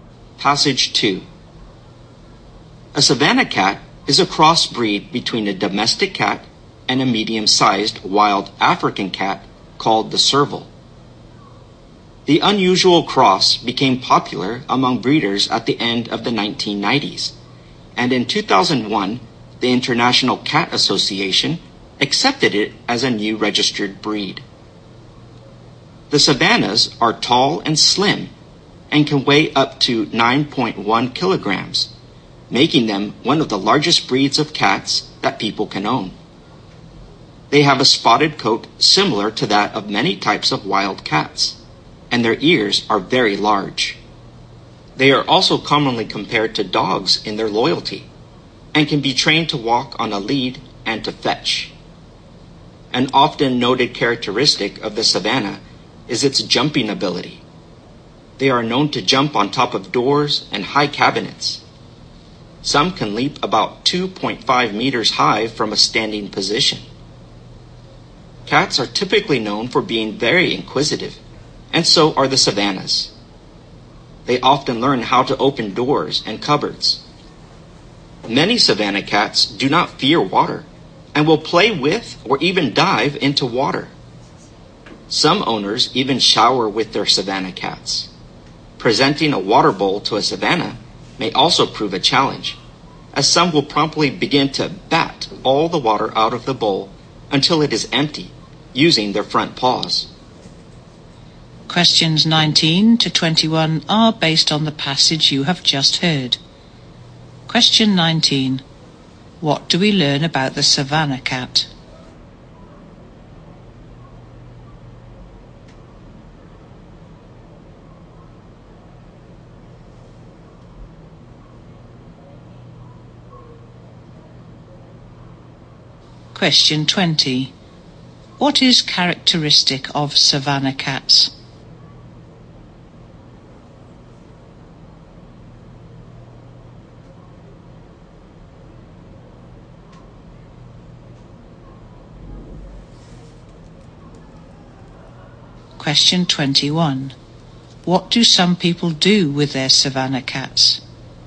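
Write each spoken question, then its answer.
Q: What is characteristic of savannah cats?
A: Their jumping ability

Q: What do some people do with their savannah cats?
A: They shower with them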